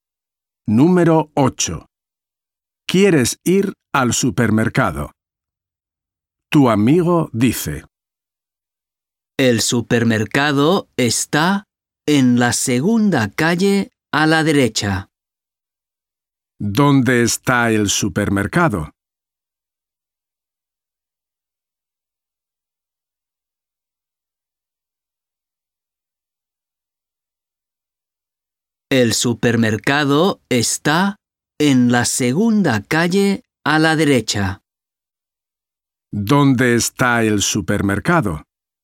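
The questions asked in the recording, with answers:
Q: ¿Dónde está el supermercado?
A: en la segunda calle a la derecha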